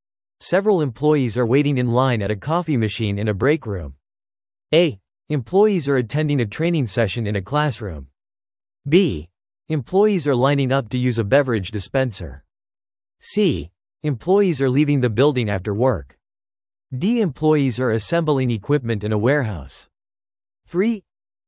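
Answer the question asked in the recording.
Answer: B: Employees are lining up to use a beverage dispenser.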